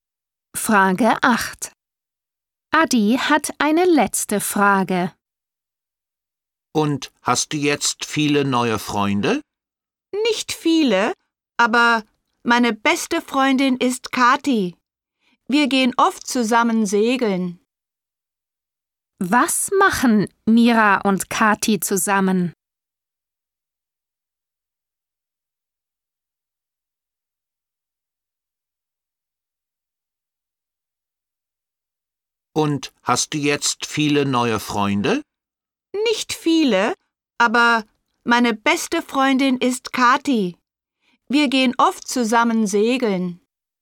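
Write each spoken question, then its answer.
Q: Was machen Mira und Kathi zusammen?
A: Sie gehen segeln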